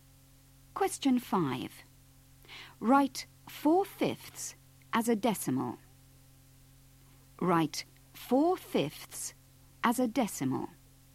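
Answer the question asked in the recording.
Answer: 0.8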